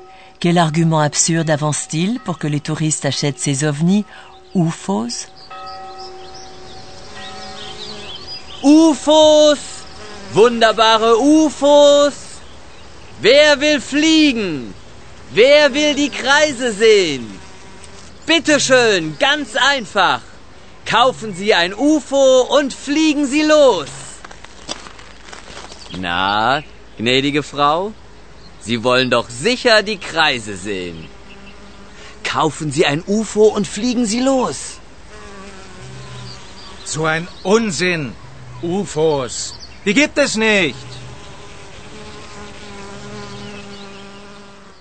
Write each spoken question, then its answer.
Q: Quel argument absurde avance-t-il pour que les touristes achètent ces ovnis UFOs?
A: Il prétend que si les gens les achètent, kaufen, ils pourront ensuite s'envoler à bord de ces engins.